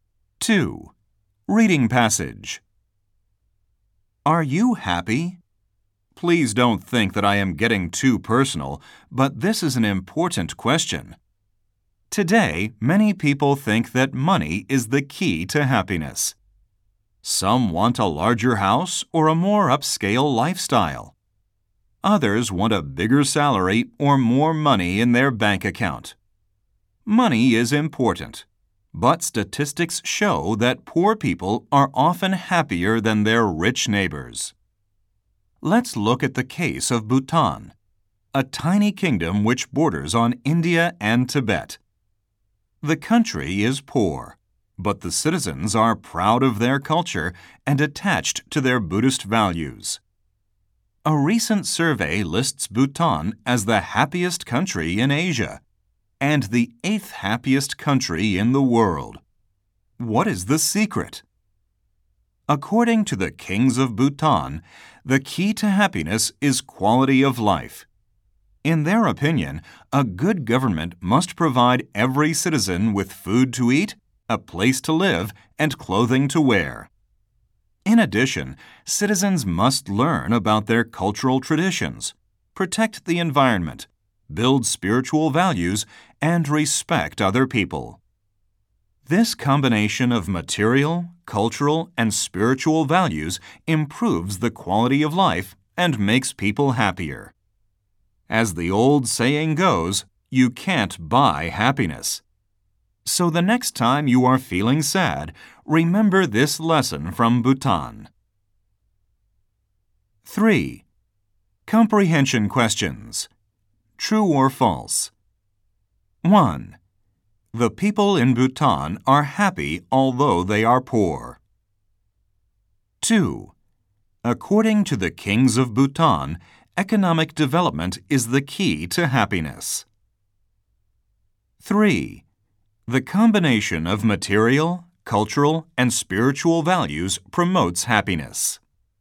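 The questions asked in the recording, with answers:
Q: The people in Bhutan are happy although they are poor.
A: True

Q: According to the kings of Bhutan, economic development is the key to happiness.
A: False

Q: The combination of material, cultural, and spiritual values promotes happiness.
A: True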